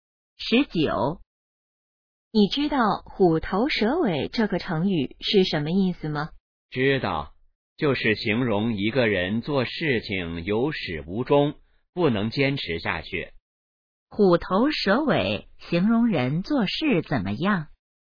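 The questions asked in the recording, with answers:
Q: 虎头蛇尾形容人做事怎么样?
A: 有始无终,不能坚持下去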